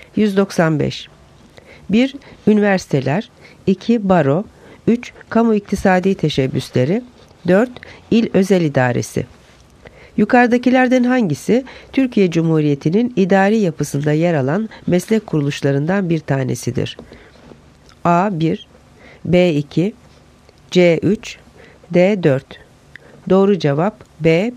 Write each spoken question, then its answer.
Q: Yukarıdakilerden hangisi Türkiye Cumhuriyeti'nin idari yapısında yer alan meslek kuruluşlarından bir tanesidir?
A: Doğru cevap B. 2.